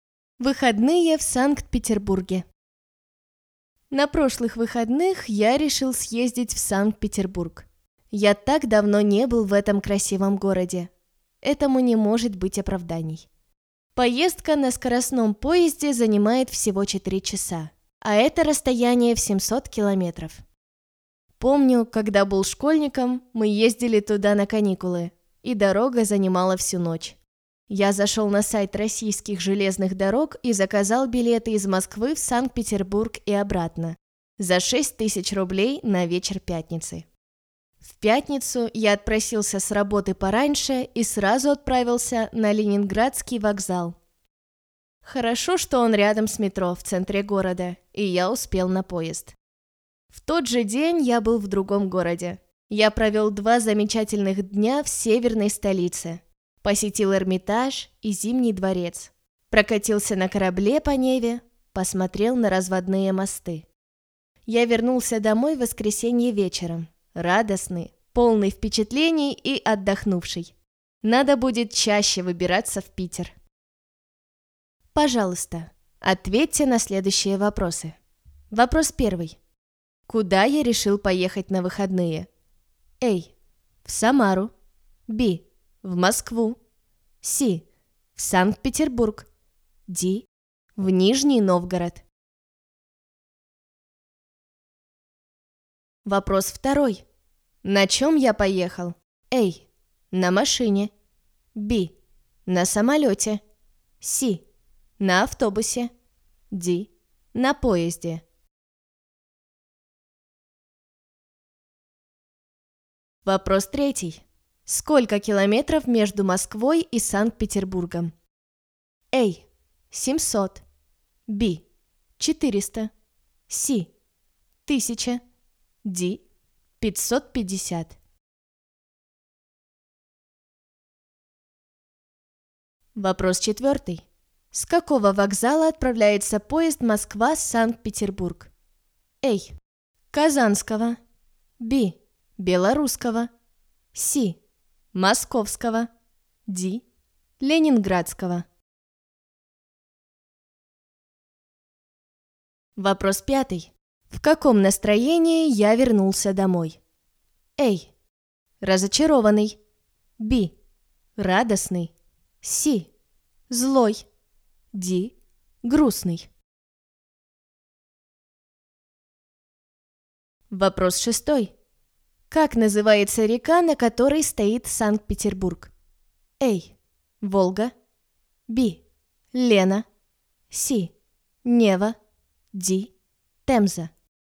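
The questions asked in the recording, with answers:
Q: Куда я решил поехать на выходные?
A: C: В Санкт-Петербург

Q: На чем я поехал?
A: D: На поезде

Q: Сколько километров между Москвой и Санкт-Петербургом?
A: A: 700

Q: С какого вокзала отправляется поезд Москва-Санкт-Петербург?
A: Д: Ленинградского

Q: В каком настроении я вернулся домой?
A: Б: Радостный

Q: Как называется река, на которой стоит Санкт-Петербург?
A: С: Нева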